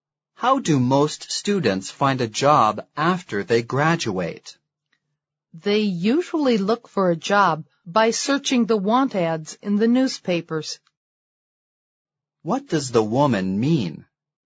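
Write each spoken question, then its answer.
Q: What does the woman mean?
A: Most students find jobs by searching the want ads in newspapers.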